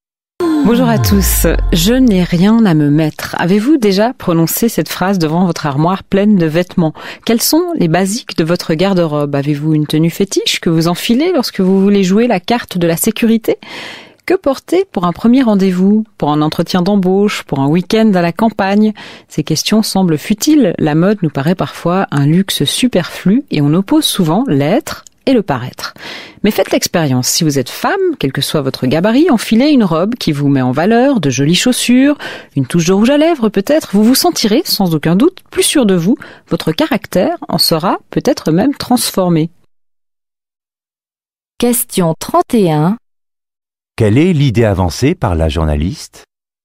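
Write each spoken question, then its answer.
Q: Quelle est l'idée avancée par la journaliste?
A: Les vêtements peuvent nous donner confiance en nous et même transformer notre caractère.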